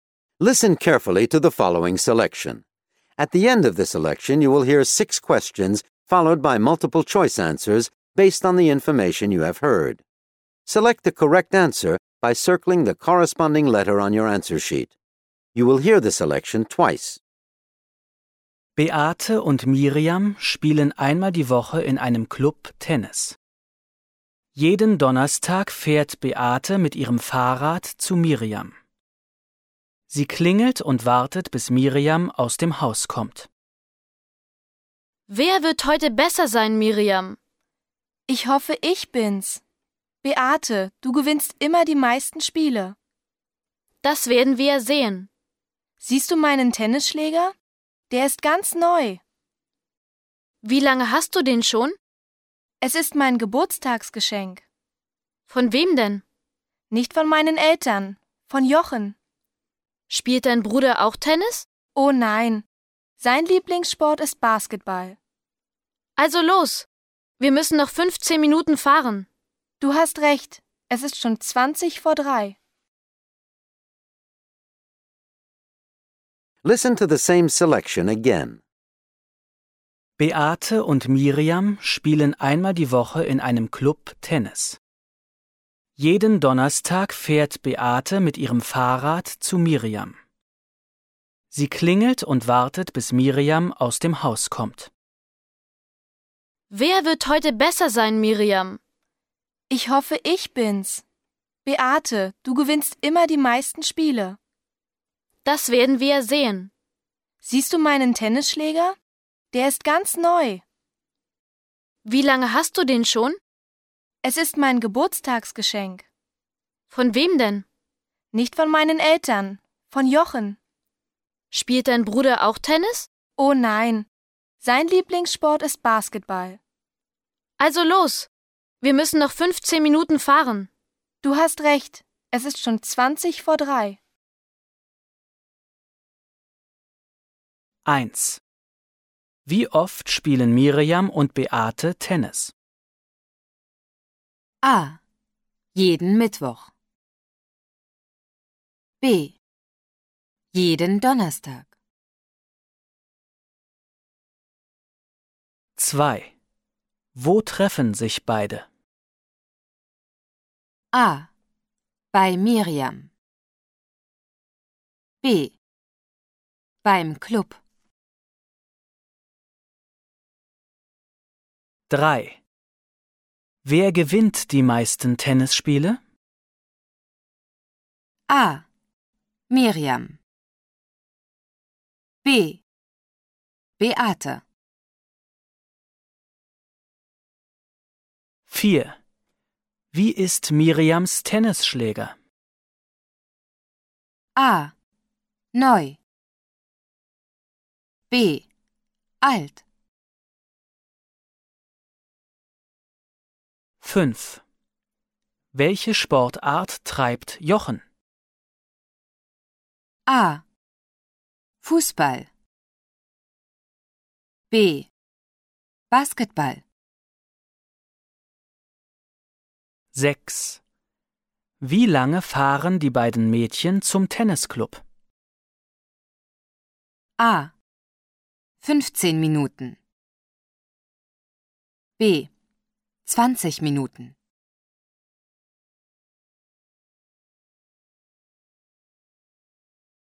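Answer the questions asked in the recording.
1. B: Jeden Donnerstag.
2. A: Bei Miriam.
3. B: Beate.
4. A: Neu.
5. B: Basketball.
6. A: 15 Minuten.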